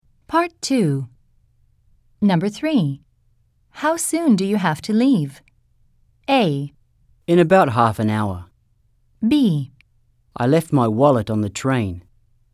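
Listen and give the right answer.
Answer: A: In about half an hour.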